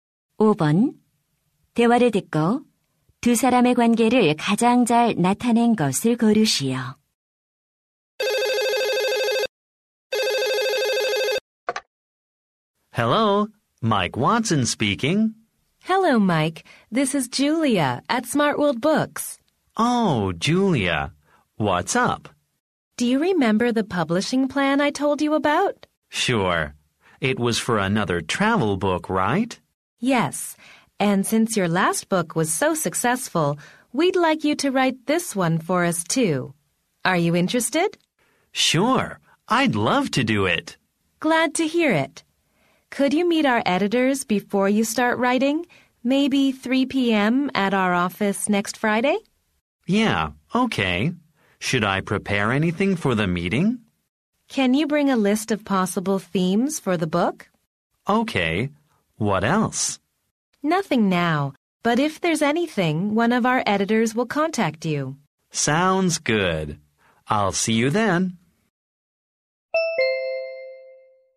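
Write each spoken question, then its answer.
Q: 대화를 듣고 두 사람의 관계를 가장 잘 나타낸 것을 고르시오.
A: 작가 - 출판사 직원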